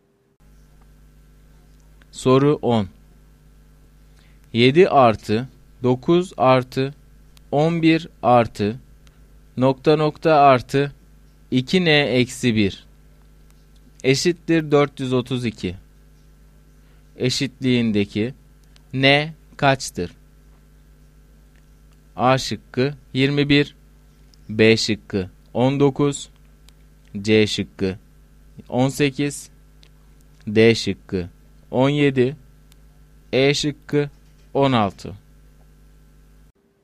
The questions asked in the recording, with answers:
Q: Eşitliğindeki N kaçtır?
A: Doğru cevap A şıkkı.